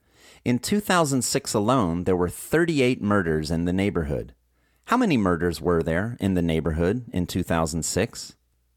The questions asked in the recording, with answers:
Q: How many murders were there in the neighborhood in 2006?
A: In 2006, there were 38 murders in the neighborhood.